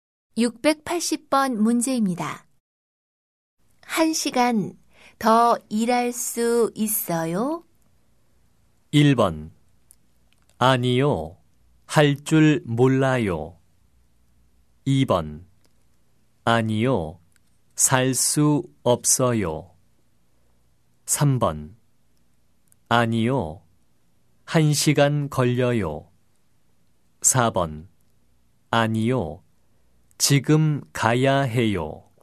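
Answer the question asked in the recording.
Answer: 4: 아니요, 지금 가야 해요.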